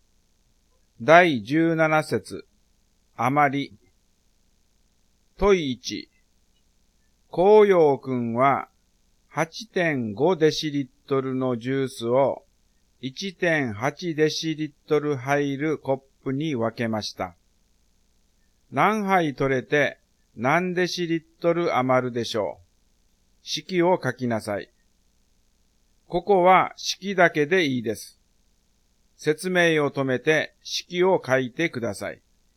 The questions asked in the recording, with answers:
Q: 何杯取れて何デシリットル余るでしょう。式を書きなさい。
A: 8.5 割る 1.8 になりますね